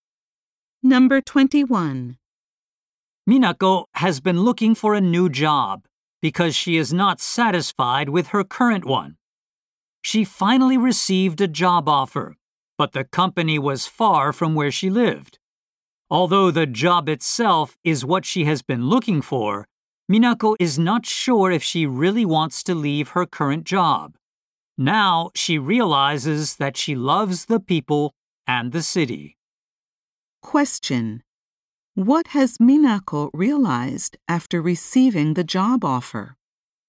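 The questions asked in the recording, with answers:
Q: What has Minako realized after receiving the job offer?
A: She loves the people and the city where she lives.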